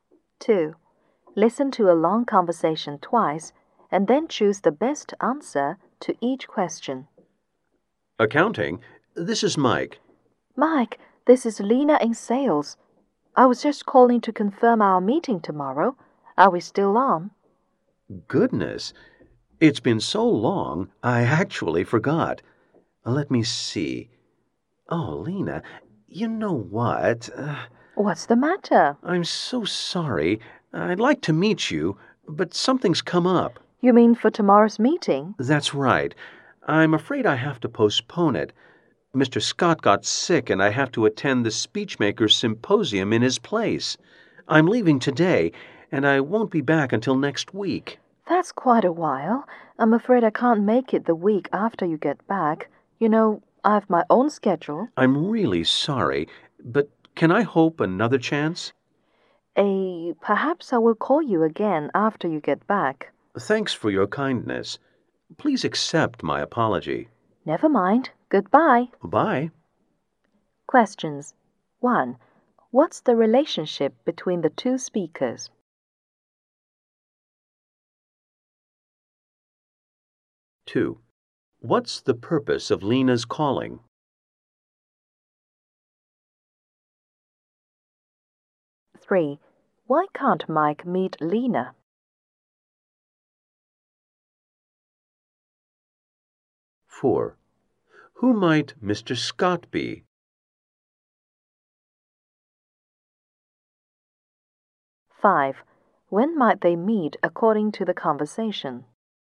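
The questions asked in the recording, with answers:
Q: What's the relationship between the 2 speakers?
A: Colleagues in the same company (Mike in accounting, Lena in sales)

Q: What's the purpose of Lena's calling?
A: To confirm their meeting tomorrow

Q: Why can't Mike meet Lena?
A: Mr. Scott got sick and Mike has to attend the Speechmakers Symposium in his place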